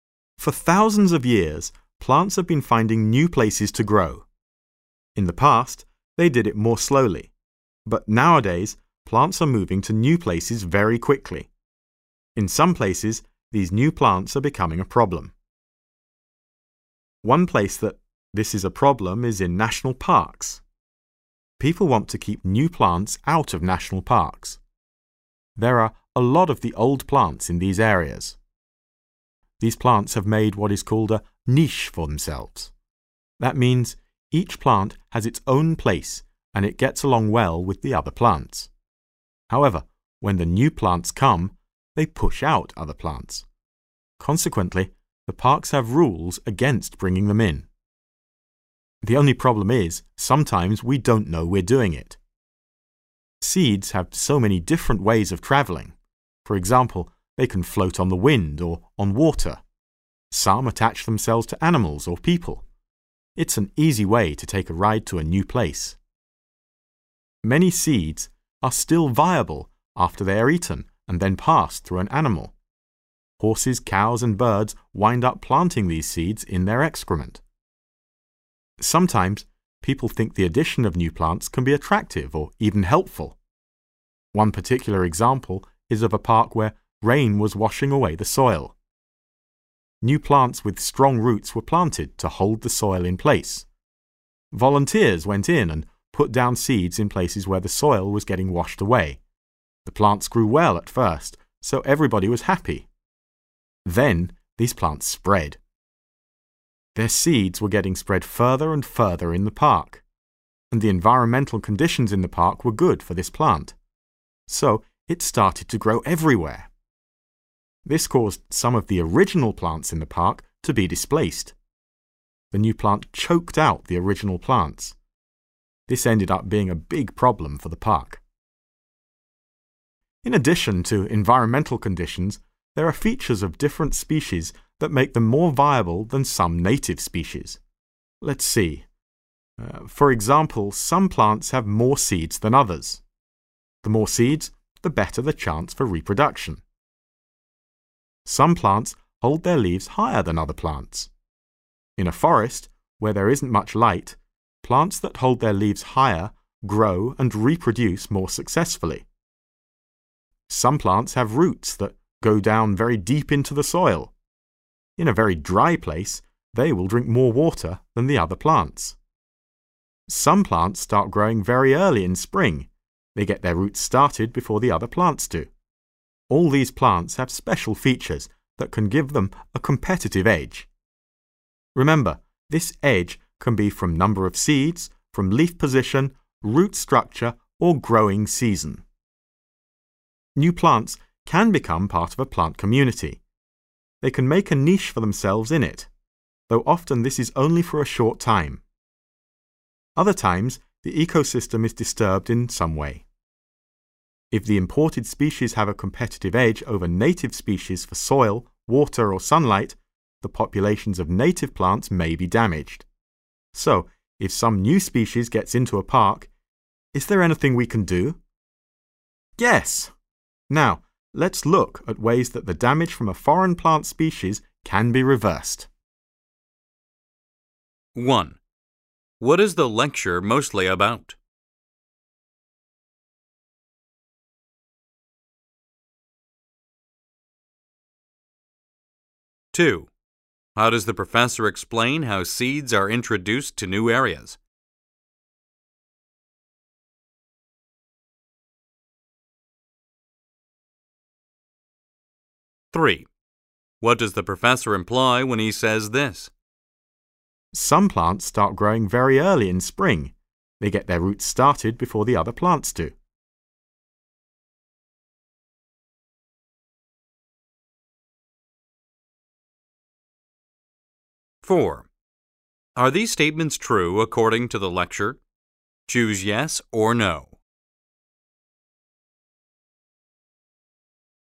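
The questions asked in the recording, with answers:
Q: What is the lecture mostly about?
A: New plant species moving into places like national parks, where they can push out native plants

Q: How does the professor explain how seeds are introduced to new areas?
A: He gives examples of how seeds travel: on the wind or water, stuck to animals or people, or passed through animals

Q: What does the professor imply when he says this?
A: Growing early gives these plants a competitive edge over other plants

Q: What will the professor discuss next?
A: Ways to reverse the damage caused by foreign plant species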